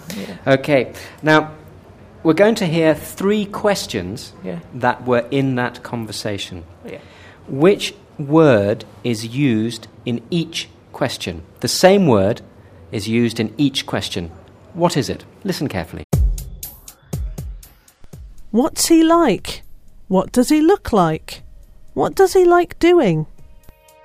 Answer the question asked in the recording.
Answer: Like.